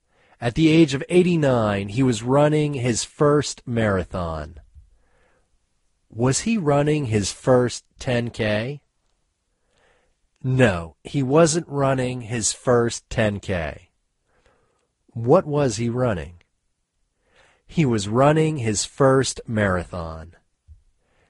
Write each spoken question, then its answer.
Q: What was he running?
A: He was running his first marathon.